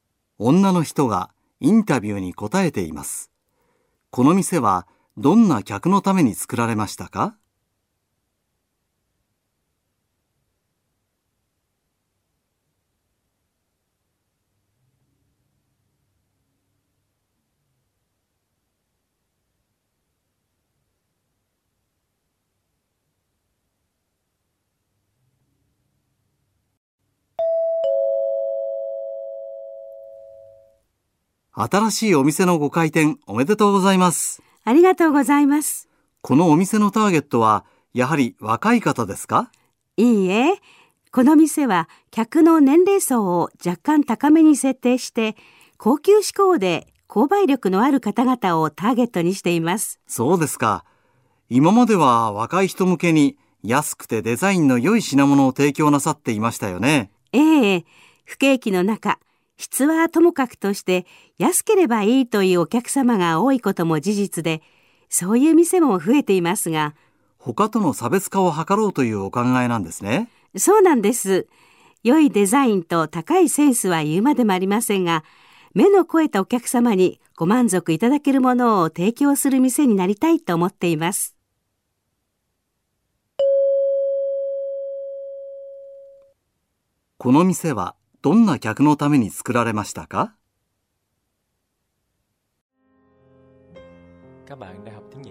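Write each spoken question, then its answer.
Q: この店はどんな客のために作られましたか?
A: 年齢層が高めで、高級志向の購買力のある客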